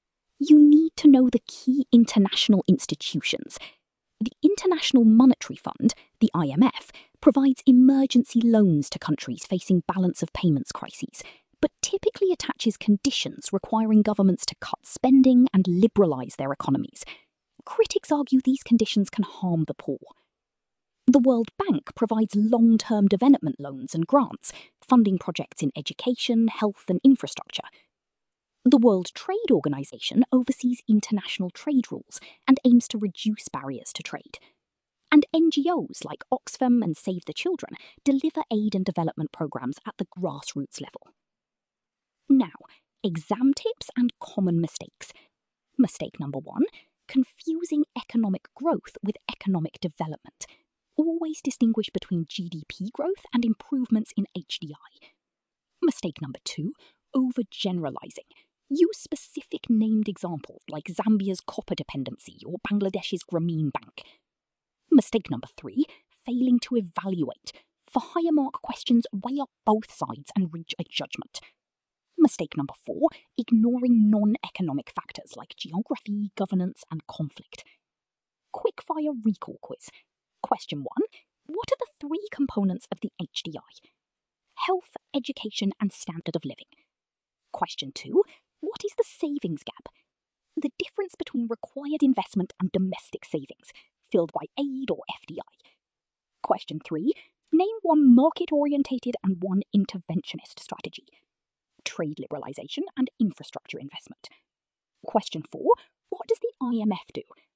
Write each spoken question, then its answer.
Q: what does the IMF do?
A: Provides emergency loans with conditions attached.